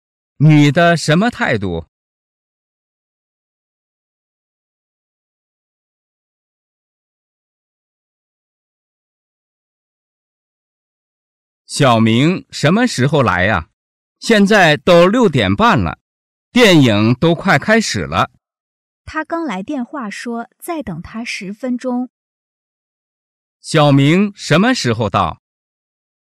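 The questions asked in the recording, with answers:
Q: 小明什么时候到?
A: 6:40

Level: 汉语水平考试(MHK)三级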